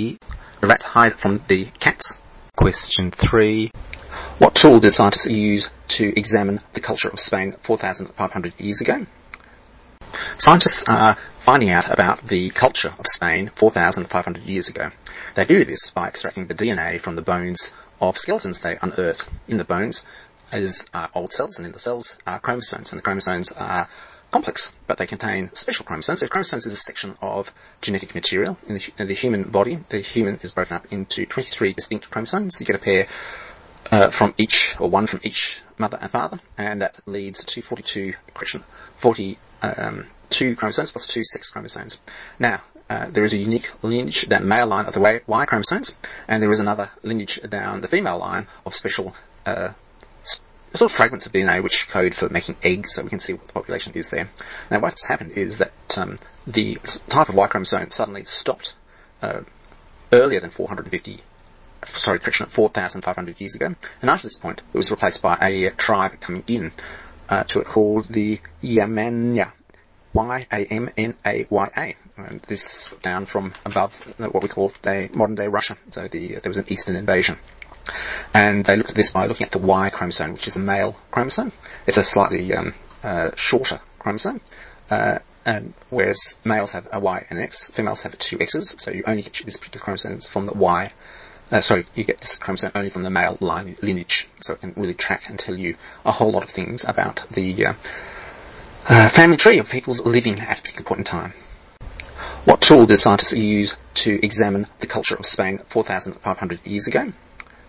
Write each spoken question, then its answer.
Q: What tool did scientists use to examine the culture of Spain 4,500 years ago?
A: They looked at the dominance of the Y chromosomes in genetic samples of skeletons.